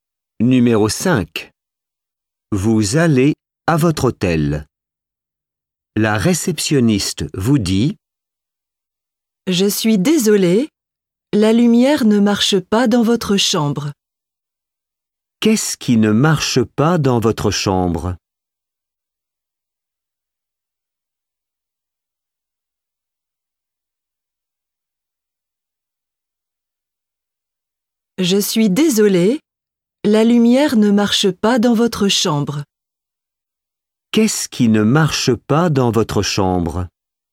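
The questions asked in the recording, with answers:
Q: Qu'est-ce qui ne marche pas dans votre chambre?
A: La lumière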